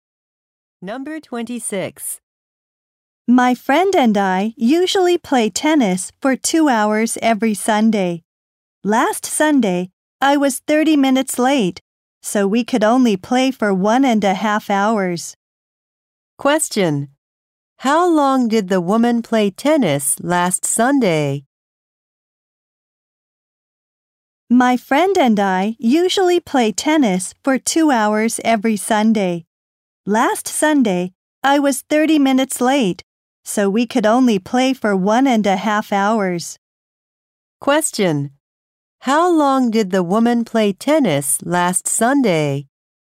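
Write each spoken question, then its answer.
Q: How long did the woman play tennis last Sunday?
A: 1.5 hours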